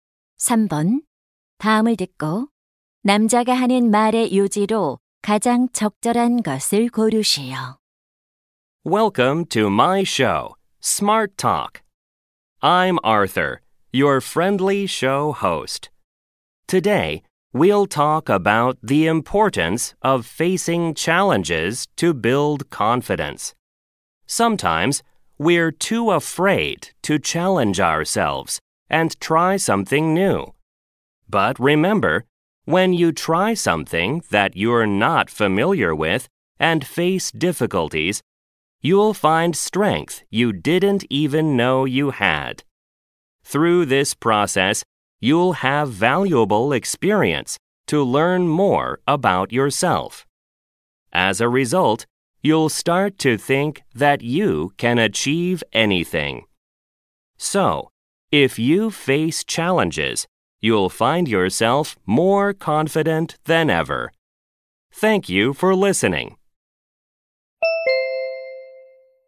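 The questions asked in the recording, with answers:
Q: 다음을 듣고 남자가 하는 말의 요지로 가장 적절한 것을 고르시오.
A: 도전에 맞서면 자신감을 키울 수 있다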